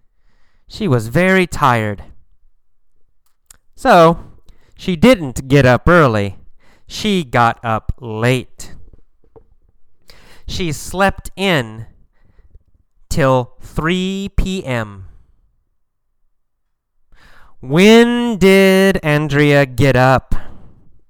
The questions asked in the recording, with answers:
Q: When did Andrea get up?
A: She got up at 3 p.m.